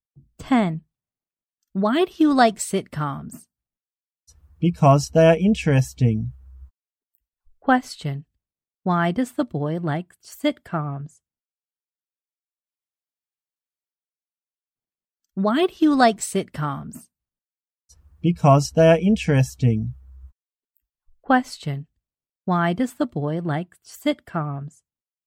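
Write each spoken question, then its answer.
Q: Why does the boy like sitcoms?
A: Because they are interesting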